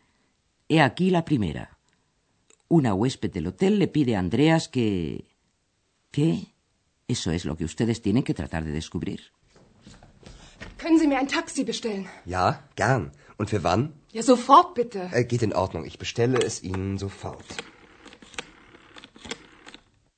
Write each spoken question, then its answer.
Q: Una huésped del hotel le pide a Andreas que... ¿Qué? Eso es lo que ustedes tienen que tratar de descubrir.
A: la señora quiere que Andreas le pida un taxi.